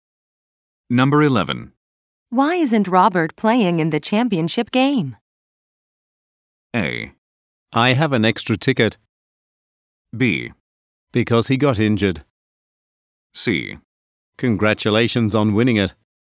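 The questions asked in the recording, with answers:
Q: Why isn't Robert playing in the championship game?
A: B: Because he got injured.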